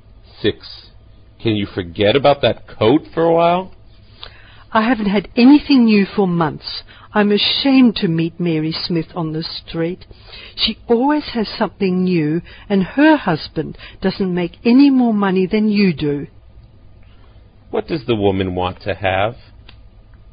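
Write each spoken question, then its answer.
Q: What does the woman want to have?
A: A new coat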